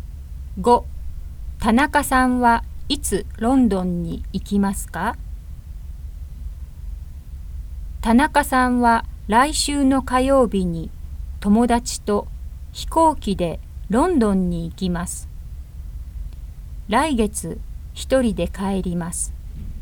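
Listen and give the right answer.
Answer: 来週の火曜日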